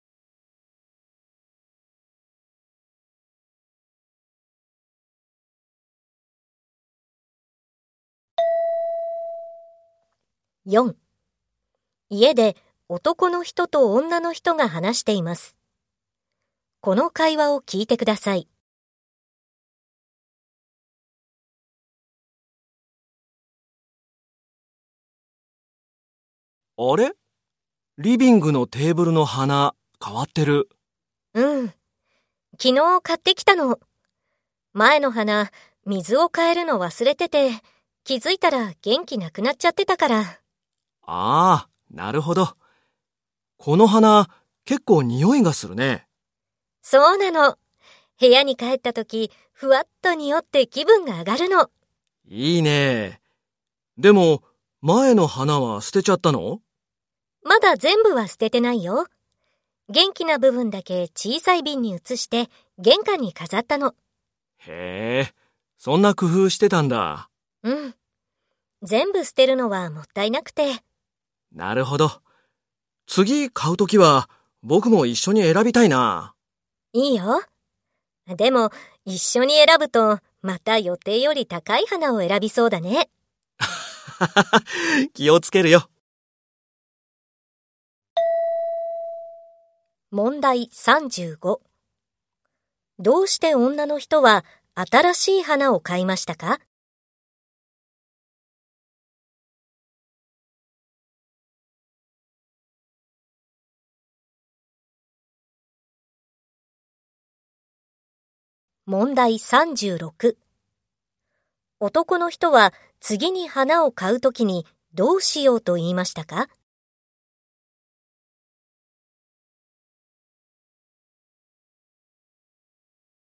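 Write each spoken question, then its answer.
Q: どうして女の人は新しい花を買いましたか?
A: 水を変えるのを忘れて前の花が元気がなくなったから

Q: 男の人は次に花を買うときにどうしようと言いましたか?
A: 一緒に選びたい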